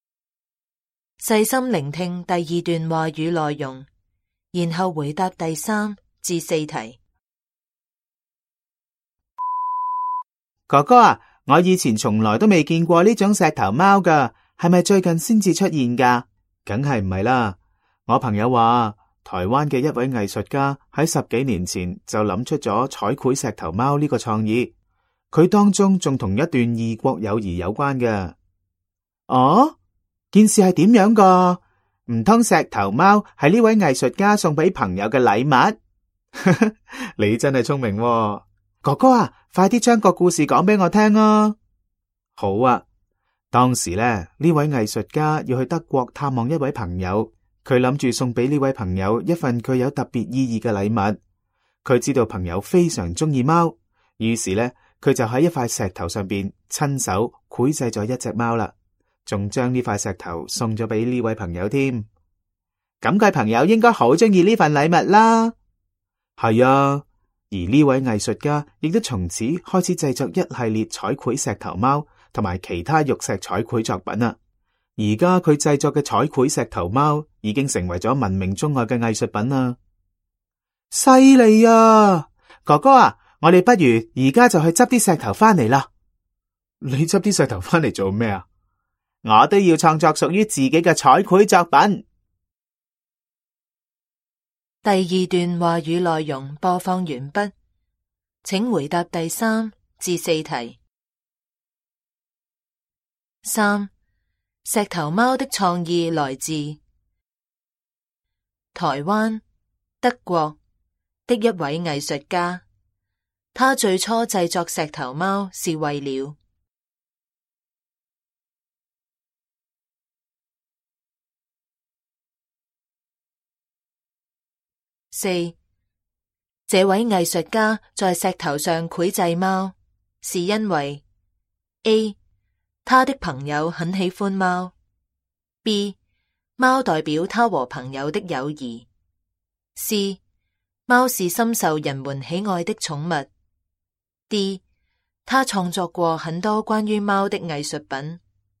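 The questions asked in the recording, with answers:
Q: 这位艺术家在石头上绘制猫是因为 A 他的朋友很喜欢猫, B 猫代表他和朋友的友谊, C 猫是深受人们喜爱的宠物, D 他创作过很多关于猫的艺术品。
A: A: 他的朋友很喜欢猫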